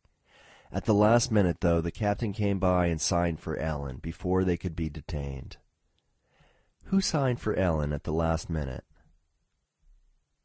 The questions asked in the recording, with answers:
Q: Who signed for Ellen at the last minute?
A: At the last minute, the captain signed for Ellen.